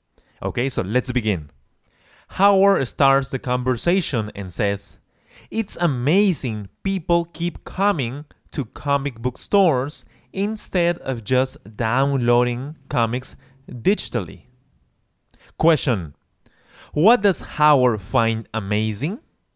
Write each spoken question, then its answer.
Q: What does Howard find amazing?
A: he finds amazing that people keep coming to comic book store instead of downloading them digitally.